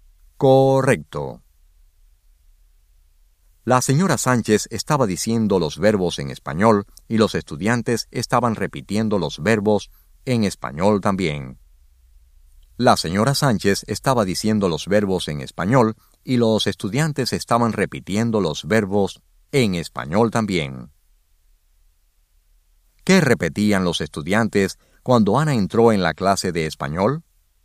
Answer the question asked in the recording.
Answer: Los estudiantes estaban repitiendo los verbos en español.